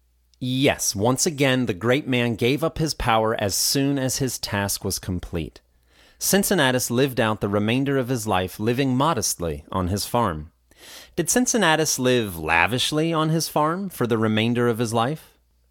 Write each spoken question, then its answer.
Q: Did Cincinnatus live lavishly on his farm for the remainder of his life?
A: No, he lived out the remainder of his life living modestly on his farm.